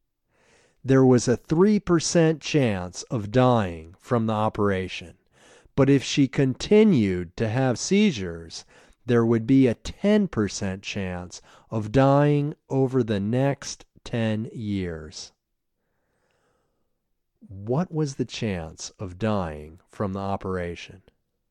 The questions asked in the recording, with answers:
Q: What was the chance of dying from the operation?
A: There was a 3% chance of dying from the operation.